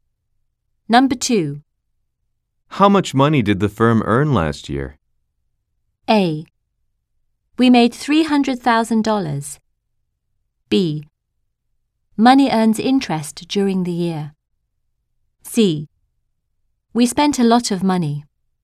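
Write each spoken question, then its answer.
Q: How much money did the firm earn last year?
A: A: We made $300,000.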